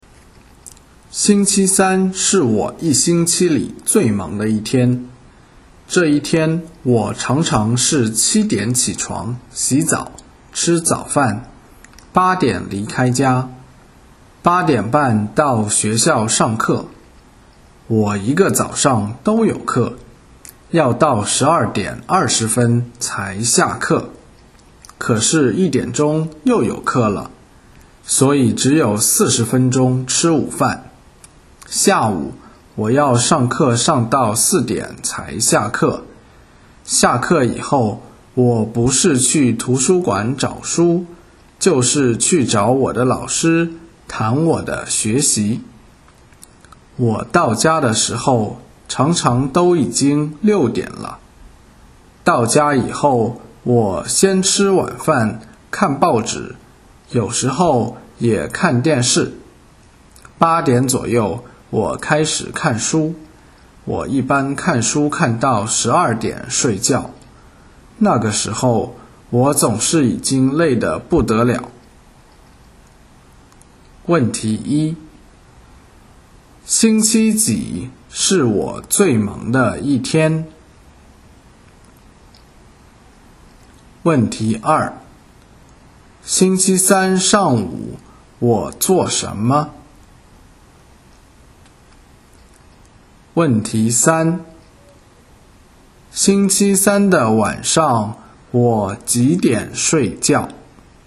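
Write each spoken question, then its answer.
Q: 星期几是我最忙的一天?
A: 星期三

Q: 星期三上午我做什么?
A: 上课

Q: 星期三的晚上我几点睡觉?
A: 12点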